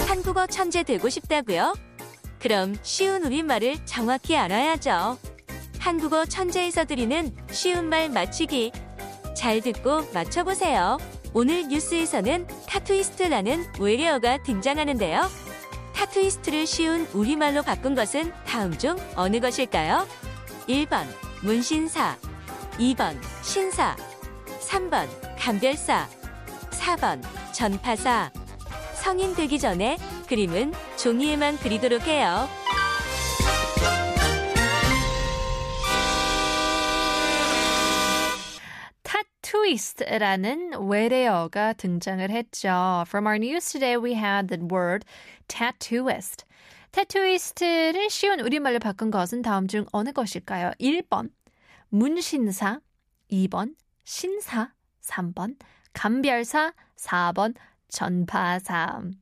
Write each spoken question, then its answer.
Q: 타투이스트를 쉬운 우리말로 바꾼 것은 다음 중 어느 것일까요?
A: Tattooist. 한글로 쉬운 우리말로 바꾸면 바로 1번이 정답이겠죠.